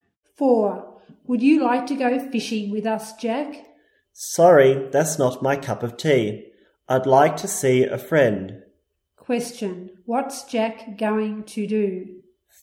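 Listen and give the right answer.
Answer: See a friend.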